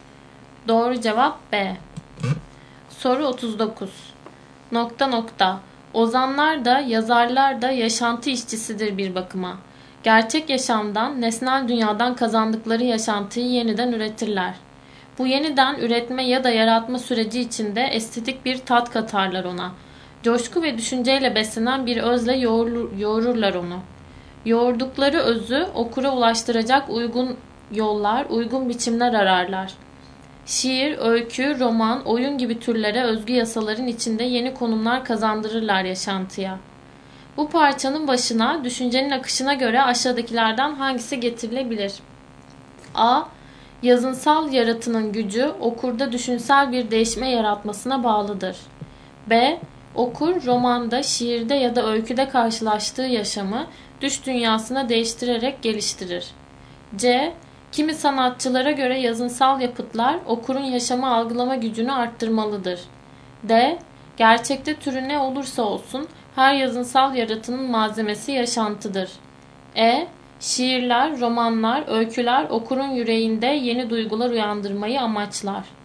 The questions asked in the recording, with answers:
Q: Bu parçanın başına düşüncenin akışına göre aşağıdakilerden hangisi getirilebilir?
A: Doğru cevap D.